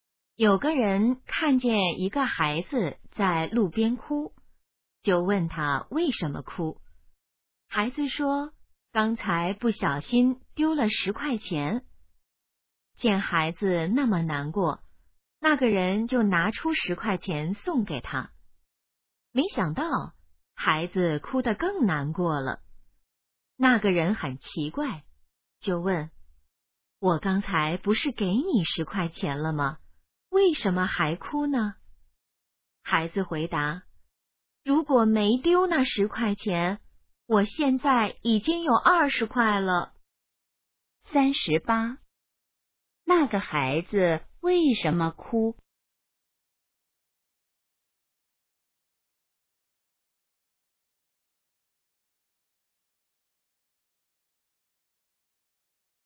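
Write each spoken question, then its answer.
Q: 那个孩子为什么哭?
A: 丢了10块钱

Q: 那个孩子现在有多少钱?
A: 10块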